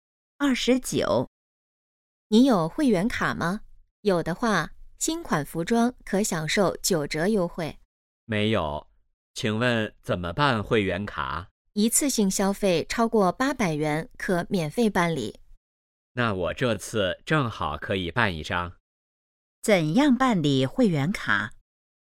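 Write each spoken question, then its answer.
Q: 怎样办理会员卡?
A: 一次性消费超过800元可免费办理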